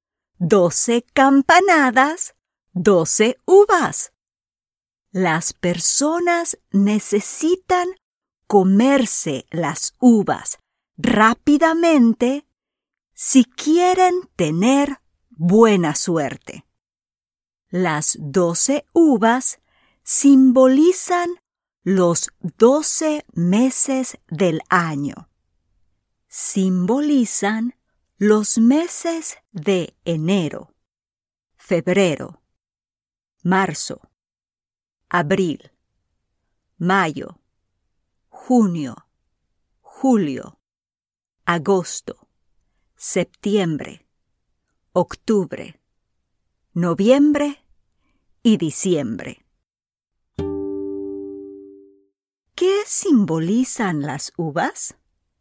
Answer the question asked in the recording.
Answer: Sí, they symbolize the 12 months of the year.